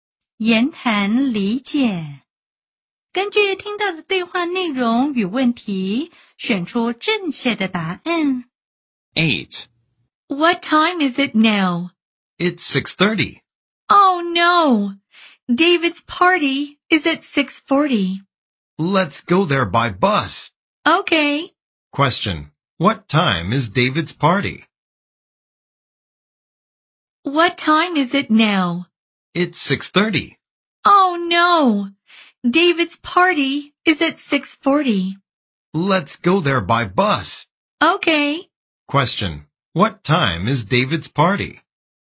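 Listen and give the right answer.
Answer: 6:40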